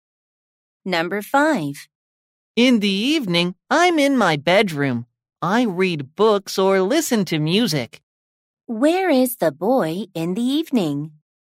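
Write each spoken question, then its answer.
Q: Where is the boy in the evening?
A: In his bedroom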